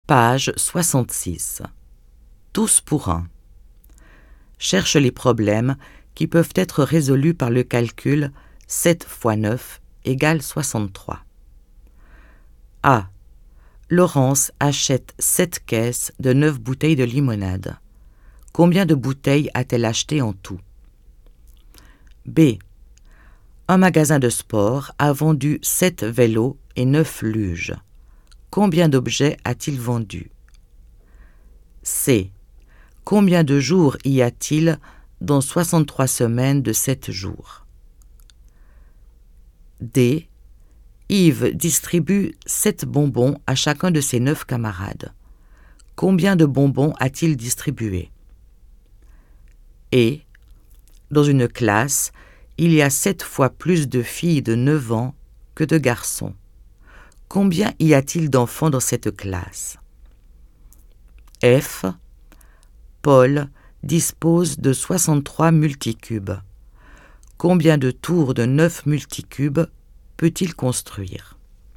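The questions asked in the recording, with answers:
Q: Cherche les problèmes qui peuvent être résolus par le calcul 7 x 9 égale 63.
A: A et D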